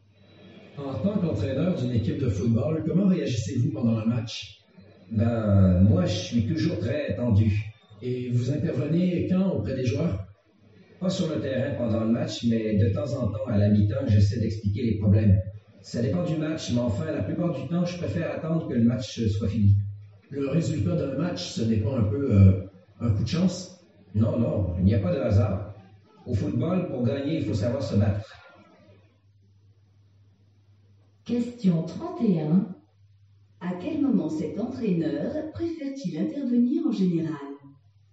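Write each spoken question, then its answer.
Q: À quel moment cet entraîneur préfère-t-il intervenir en général?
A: Après la fin du match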